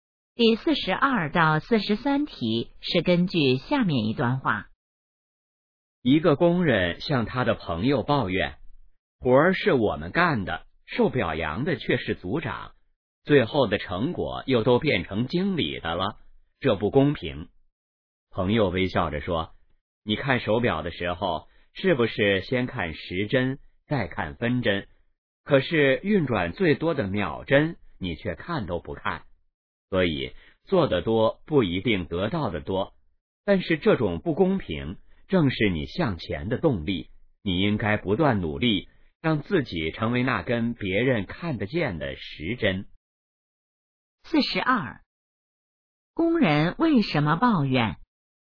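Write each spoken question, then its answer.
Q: 工人为什么抱怨?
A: 活儿是他们干的,表扬和成果却归组长和经理,觉得不公平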